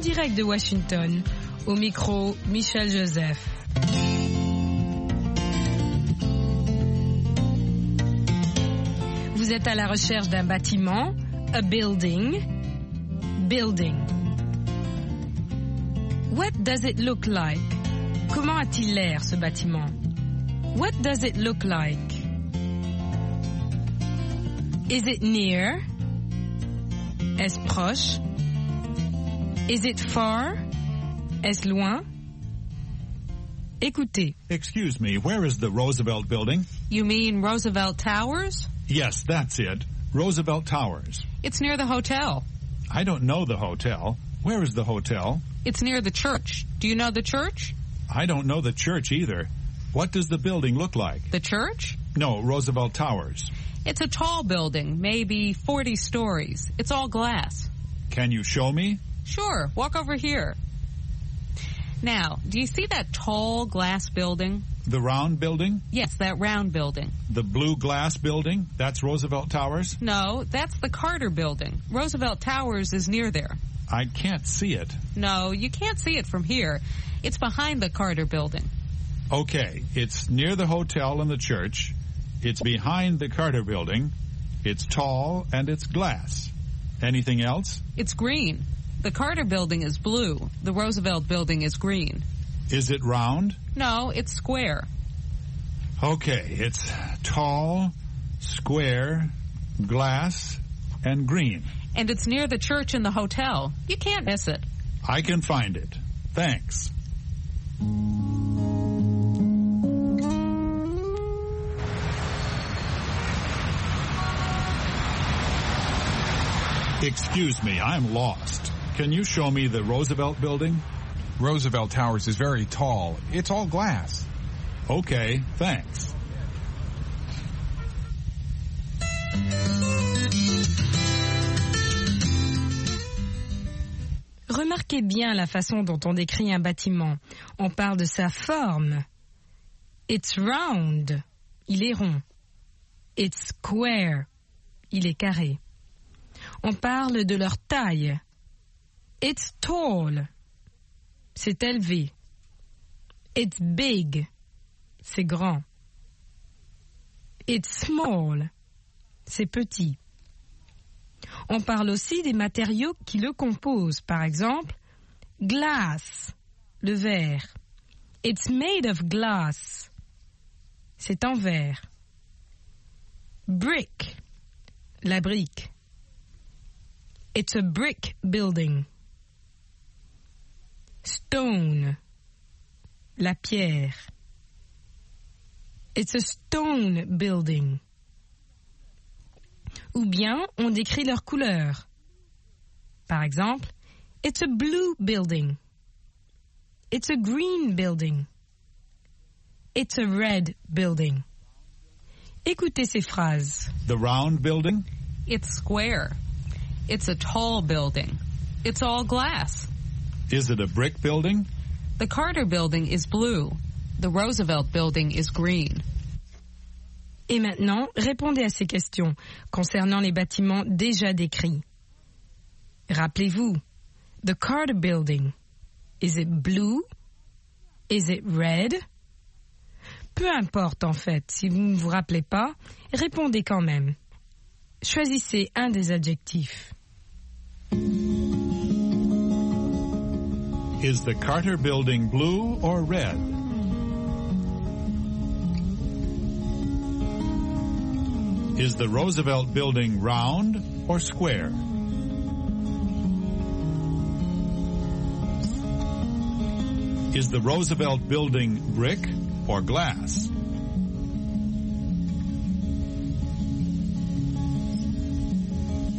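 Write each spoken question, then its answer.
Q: Is the Carter Building blue or red?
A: Blue

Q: Is the Roosevelt Building round or square?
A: Square

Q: Is the Roosevelt Building brick or glass?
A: Glass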